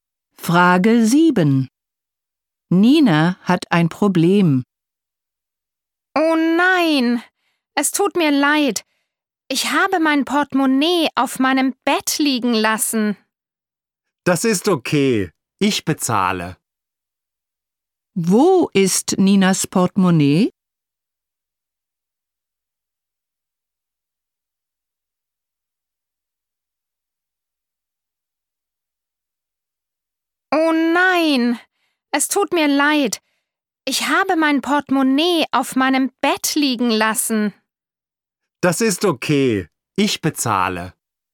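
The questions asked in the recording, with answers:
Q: Wo ist Ninas Portemonnaie?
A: Auf ihrem Bett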